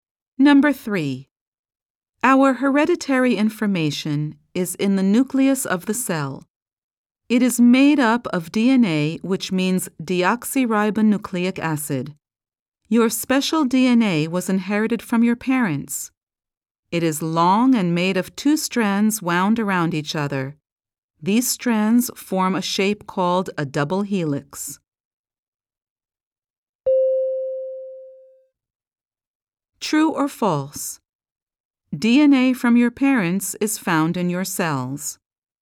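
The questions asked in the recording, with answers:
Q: True or false? DNA from your parents is found in your cells.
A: True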